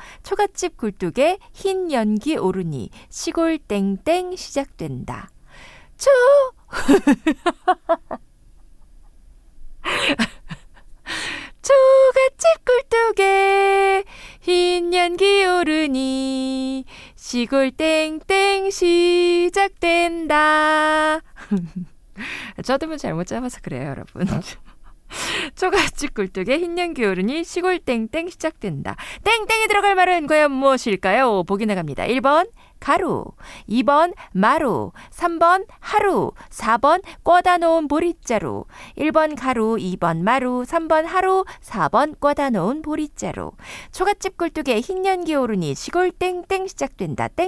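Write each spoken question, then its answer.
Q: 땡땡이 들어갈 말은 과연 무엇일까요?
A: 3: 하루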